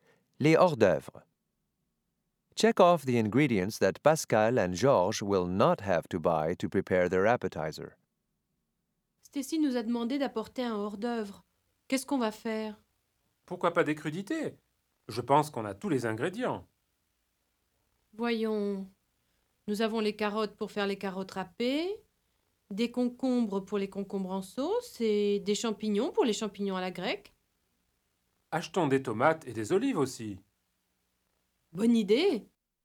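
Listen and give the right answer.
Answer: Carrots, cucumbers and mushrooms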